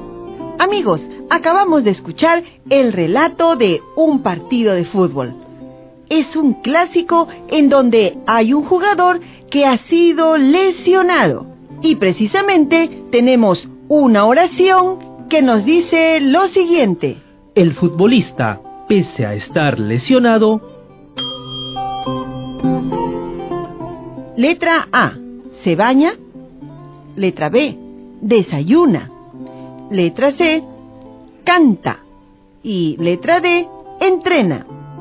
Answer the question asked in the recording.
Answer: Estoy segura que es la alternativa D, ya que el futbolista, pese a estar lesionado, entrena.